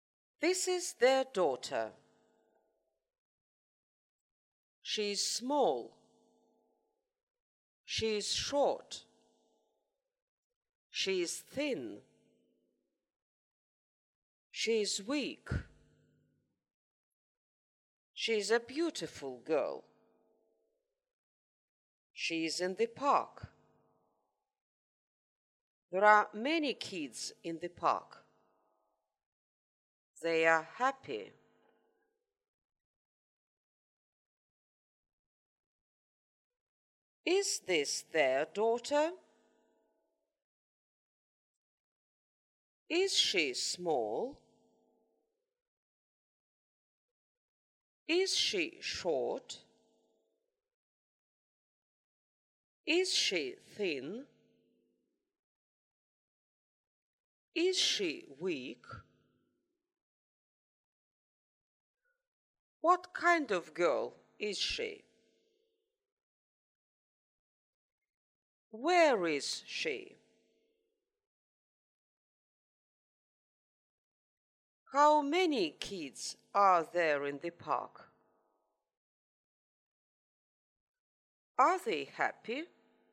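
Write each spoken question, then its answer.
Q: Is this their daughter?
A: Yes, it is.

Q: Is she small?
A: Yes, she is.

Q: Is she short?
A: Yes, she is.

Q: Is she thin?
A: Yes, she is.

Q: Is she weak?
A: Yes, she is.

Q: What kind of girl is she?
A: She is a beautiful girl.

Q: Where is she?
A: She is in the park.

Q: Are they happy?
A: Yes, they are.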